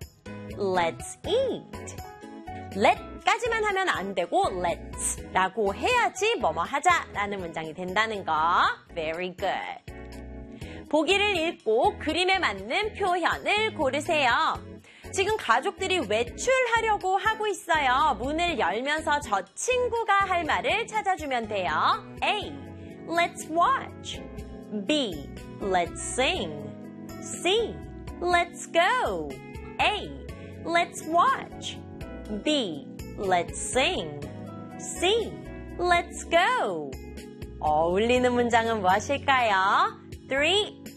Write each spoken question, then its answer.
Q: 어울리는 문장은 무엇일까요?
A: let's go. 정답은 C.